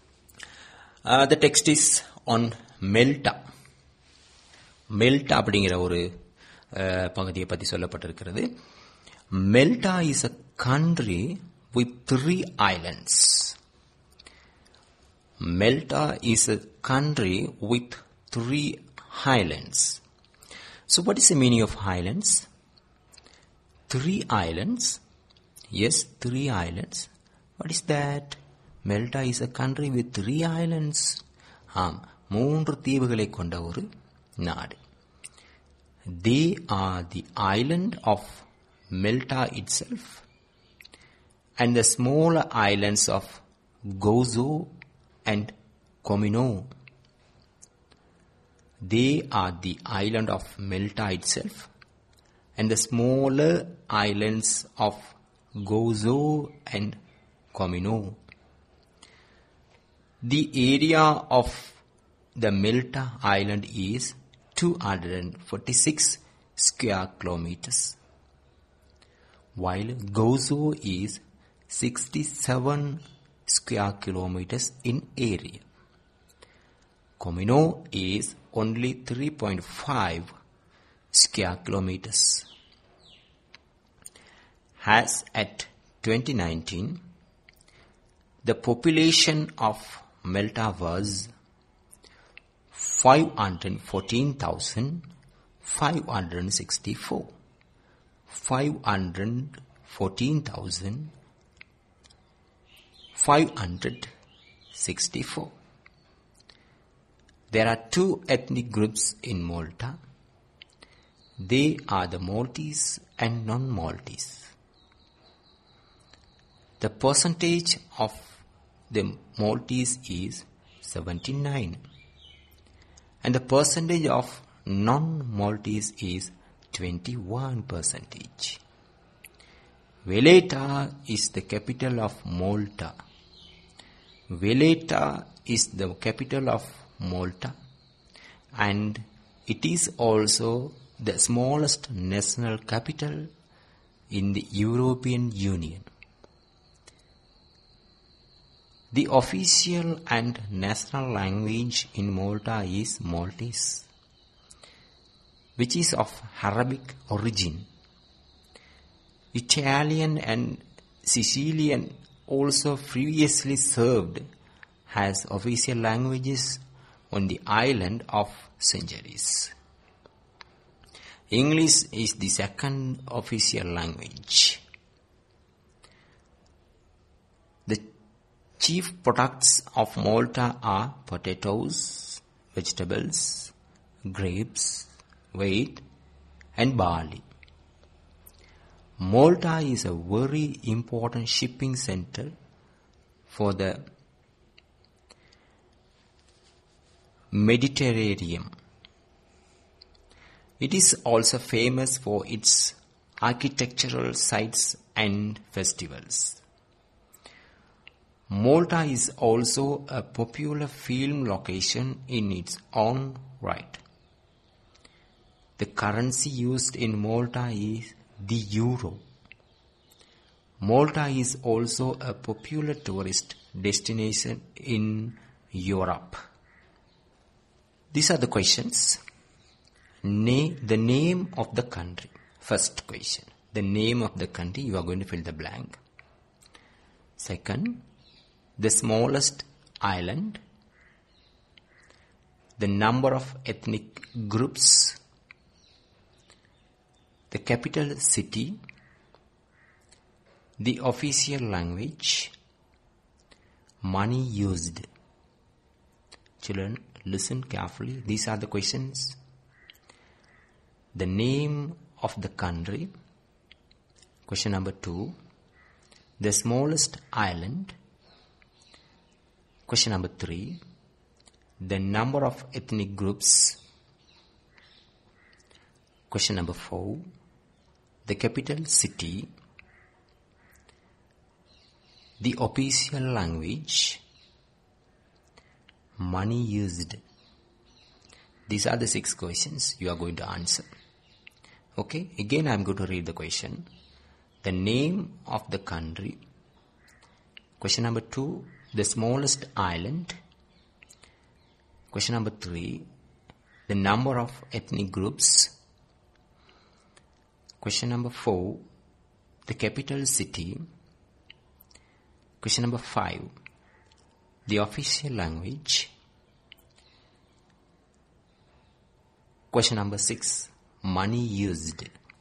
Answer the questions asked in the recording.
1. Malta, very good.
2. Yes, the smallest island is Comino.
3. The number of ethnic groups is 2.
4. Yes, Valletta.
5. Maltese. Yes, correct.
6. Yes, euro is the answer.